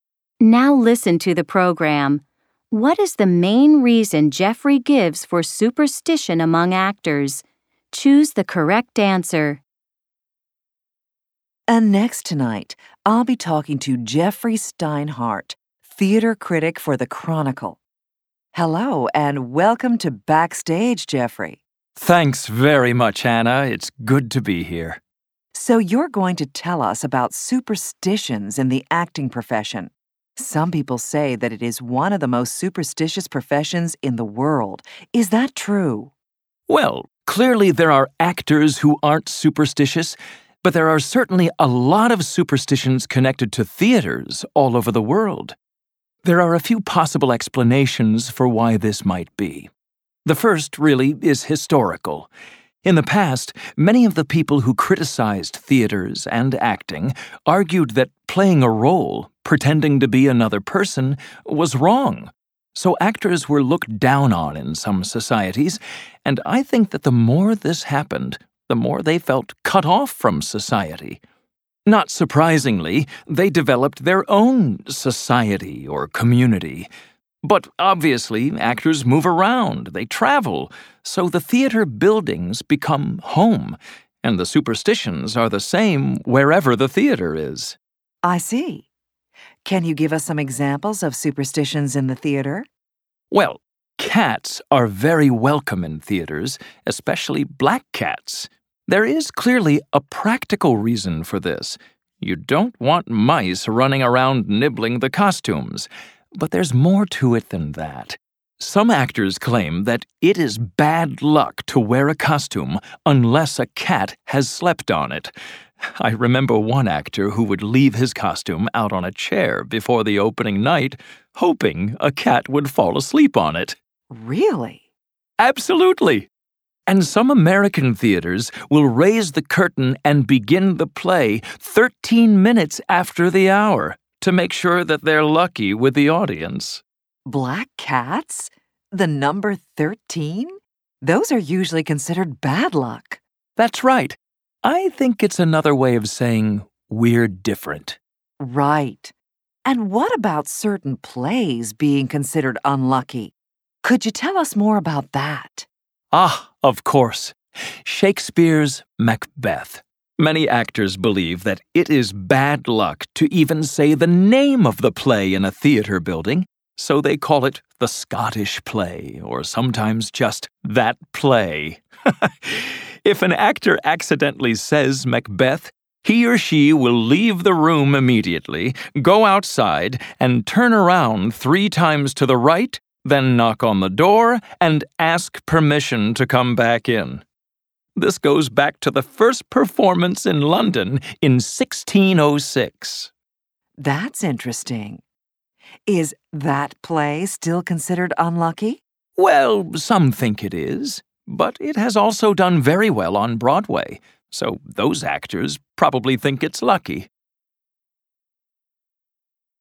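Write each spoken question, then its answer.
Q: What is the main reason Jeffrey gives for superstition among actors?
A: Historical: actors were looked down on and felt cut off from society, so they formed their own community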